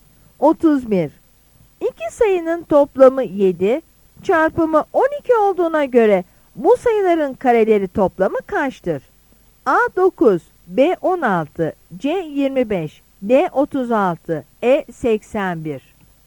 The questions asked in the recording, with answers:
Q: İki sayının toplamı 7, çarpımı 12 olduğuna göre bu sayıların kareleri toplamı kaçtır?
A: Yanıt C'dir.